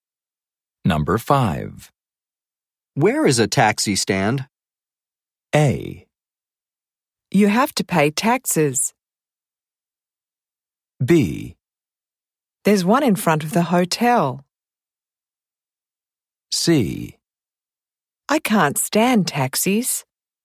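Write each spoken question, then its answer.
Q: Where is a taxi stand?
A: B: There's one in front of the hotel.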